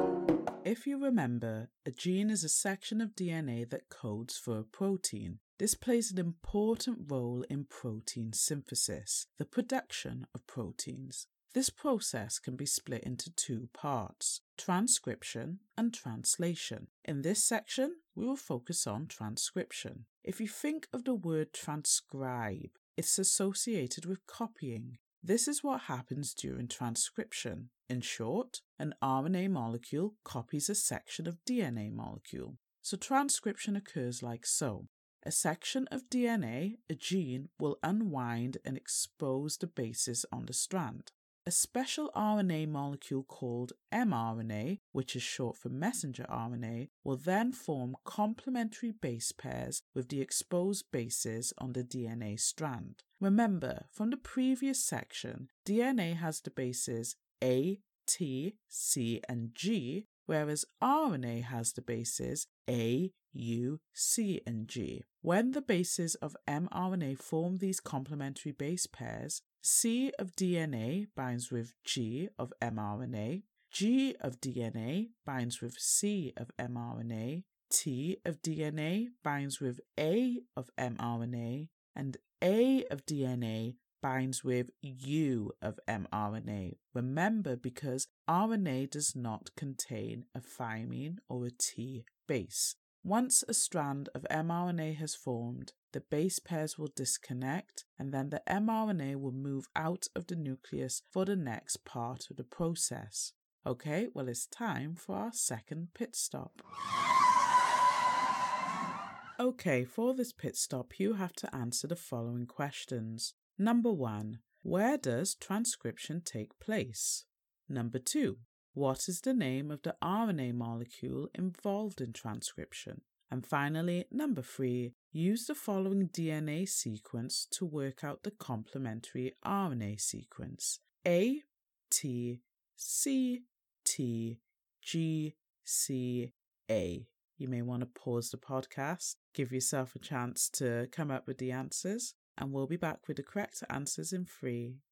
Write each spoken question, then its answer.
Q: where does transcription take place?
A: It takes place in the nucleus.

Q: what is the name of the RNA molecule involved in transcription?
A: And the correct answer for this is mRNA or messenger RNA.

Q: use the following DNA sequence to work out the complementary RNA sequence.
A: The RNA sequence will be U, A, G, A, C, G, U.